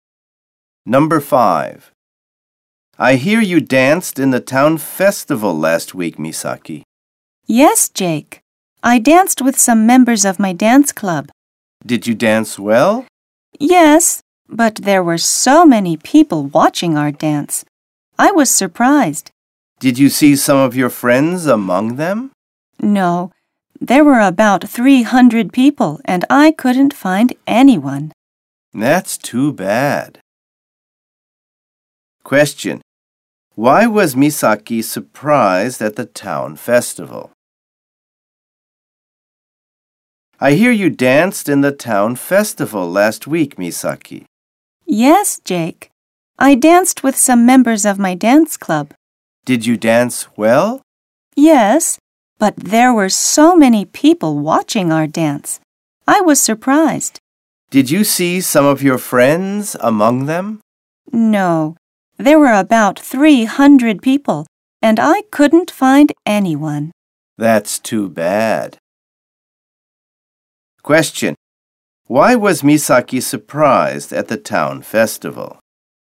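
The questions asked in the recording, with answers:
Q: Why was Misaki surprised at the town festival?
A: Because so many people were watching her dance.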